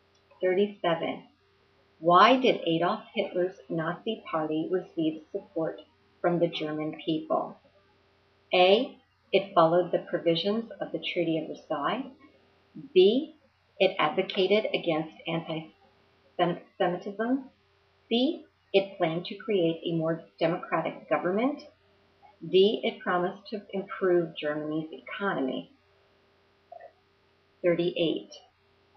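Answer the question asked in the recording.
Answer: D: It promised to improve Germany's economy.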